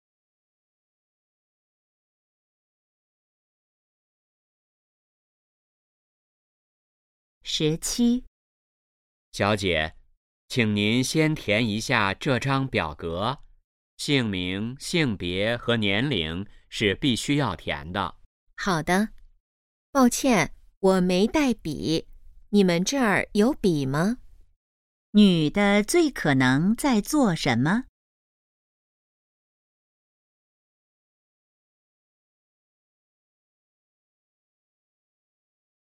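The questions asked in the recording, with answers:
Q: 女的最可能在做什么?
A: 填表格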